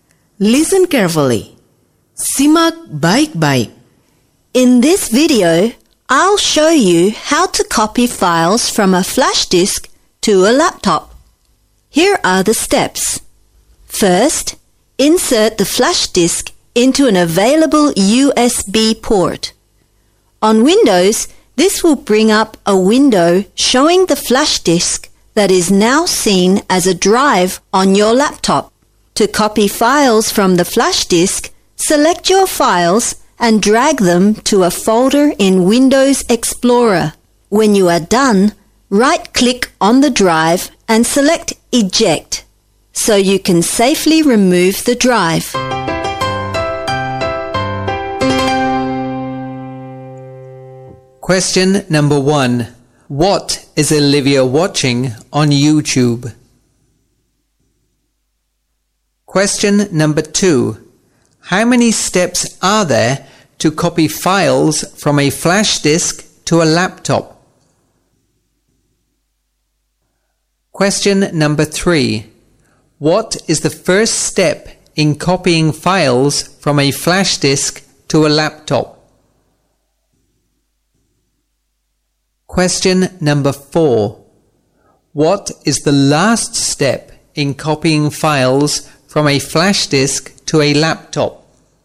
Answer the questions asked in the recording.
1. How to copy files from a flash disk to a laptop.
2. 4 steps.
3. Insert the flash disk into an available USB port.
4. Right-click on the drive and select Eject.